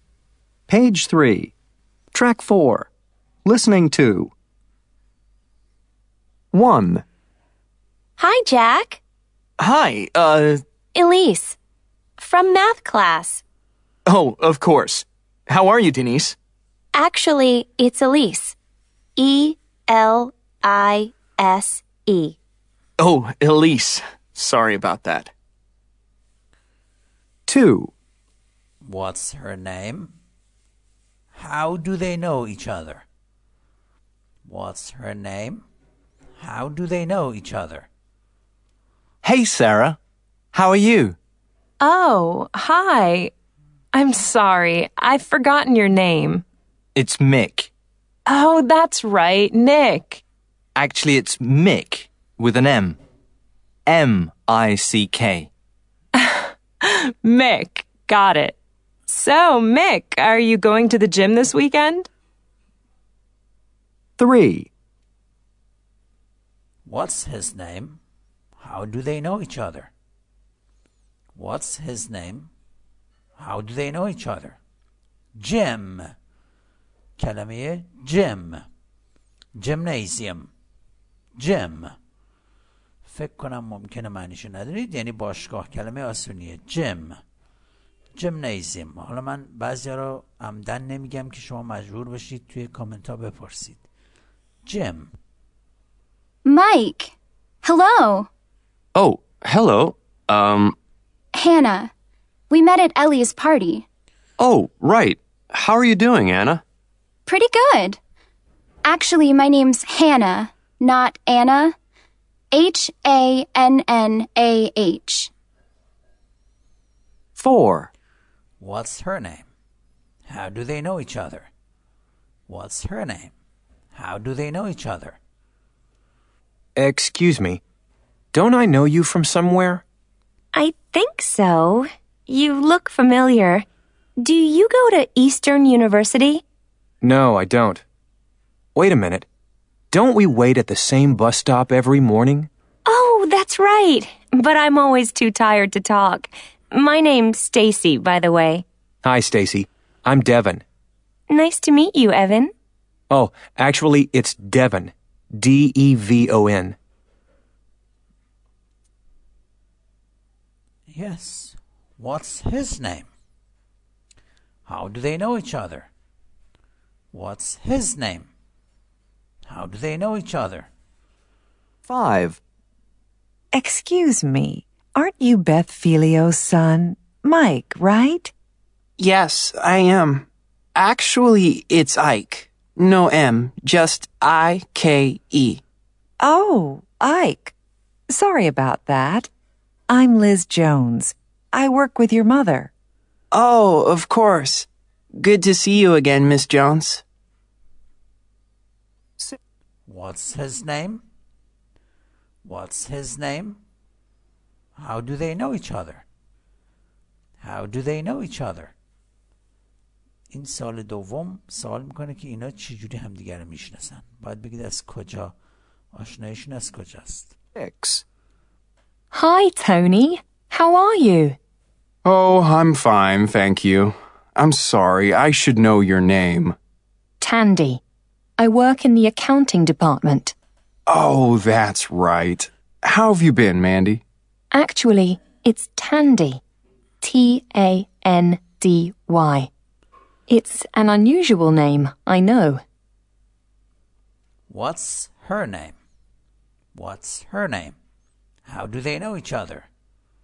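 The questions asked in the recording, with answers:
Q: What's her name? How do they know each other?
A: Elise; from math class

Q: What's her name? How do they know each other?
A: Hannah; they met at Ellie's party

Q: What's his name? How do they know each other?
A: Devon; they wait at the same bus stop

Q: What's his name?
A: Ike

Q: How do they know each other?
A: She works with his mother

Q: What's her name?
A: Tandy

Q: How do they know each other?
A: They work together; she's in the accounting department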